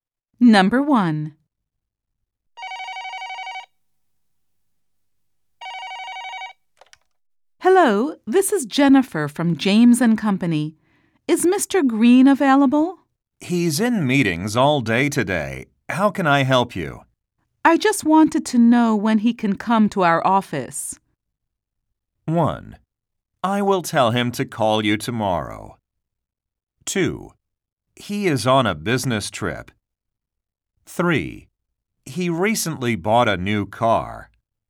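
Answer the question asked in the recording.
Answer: 1: I will tell him to call you tomorrow.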